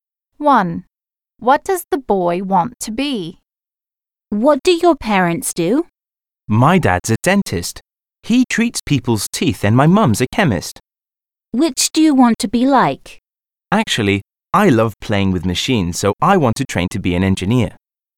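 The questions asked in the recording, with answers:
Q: What does the boy want to be?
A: An engineer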